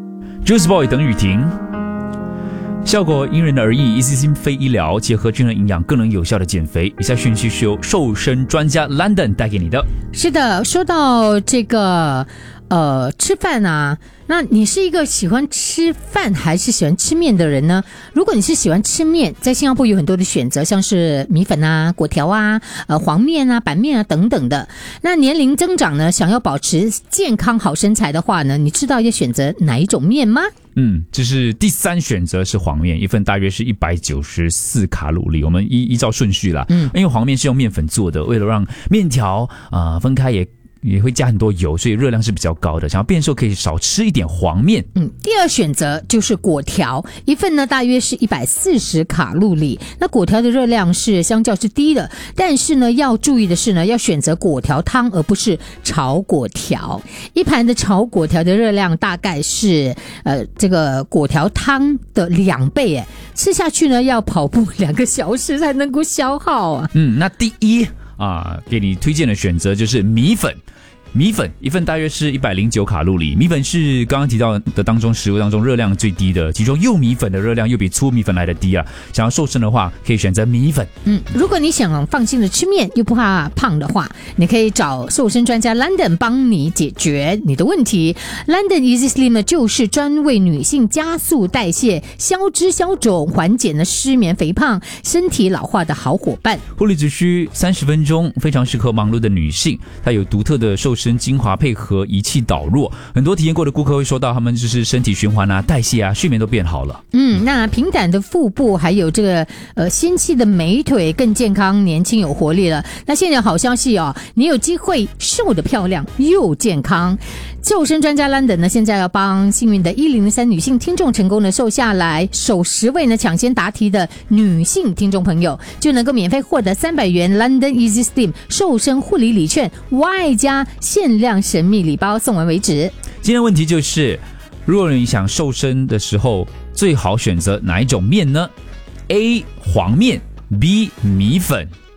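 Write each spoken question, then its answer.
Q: 如果你想瘦身的时候最好选择哪一种面呢?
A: B: 米粉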